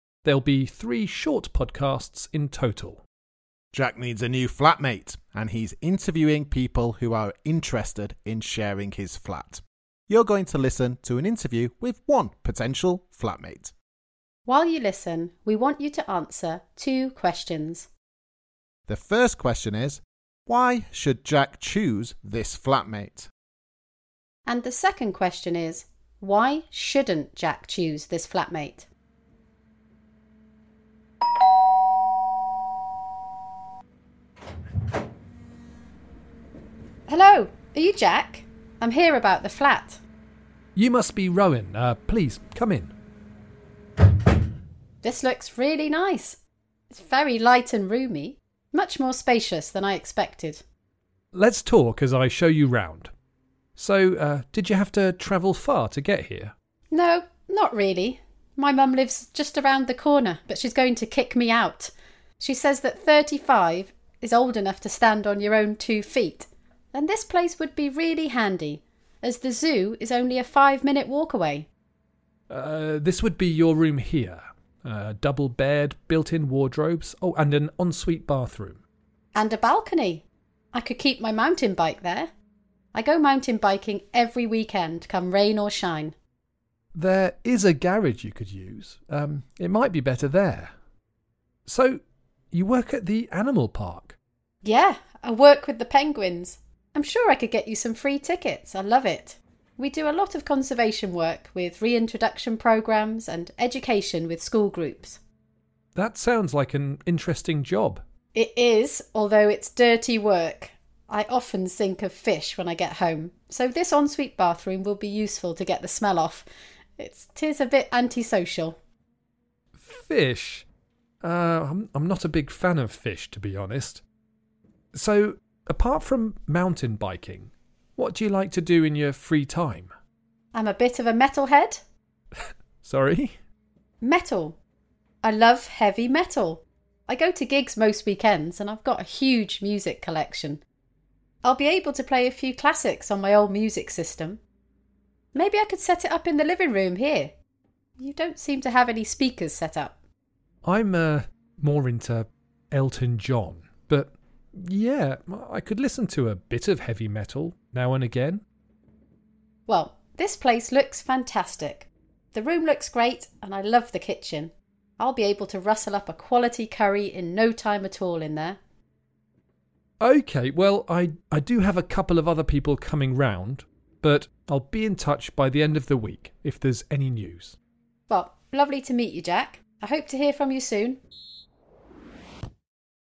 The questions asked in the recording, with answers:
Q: why should Jack choose this flatmate?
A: Well, there didn't seem to be too many positive reasons, but she seemed nice and she liked the flat.